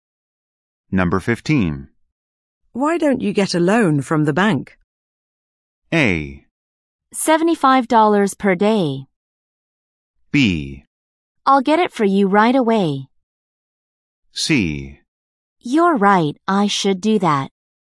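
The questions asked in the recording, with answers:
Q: Why don't you get a loan from the bank?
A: C: You're right, I should do that.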